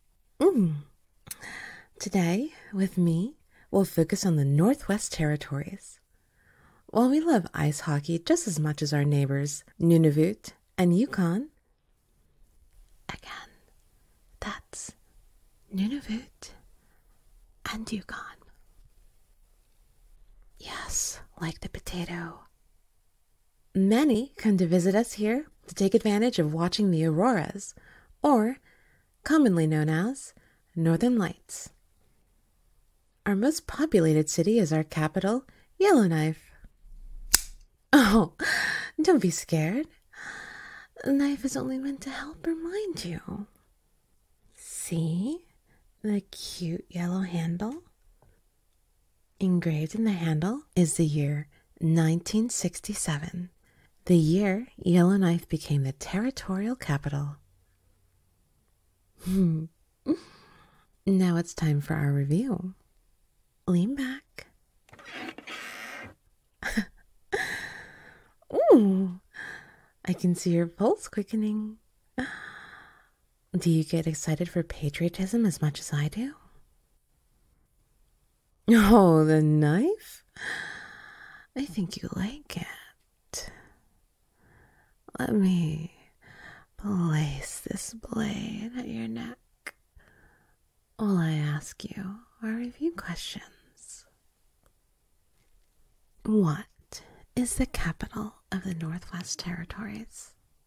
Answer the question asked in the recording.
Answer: That's right, Yellowknife.